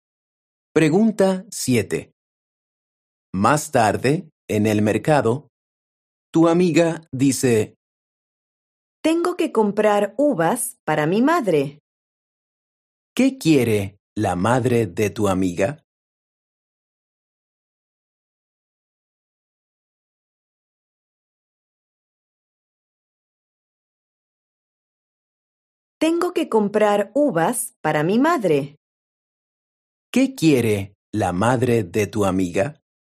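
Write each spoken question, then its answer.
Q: ¿Qué quiere la madre de tu amiga?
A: uvas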